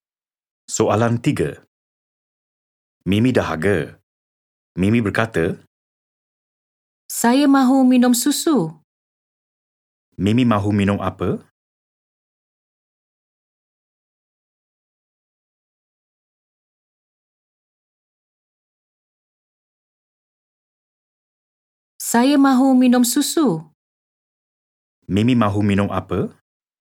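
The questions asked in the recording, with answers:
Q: Mimi mahu minum apa?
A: susu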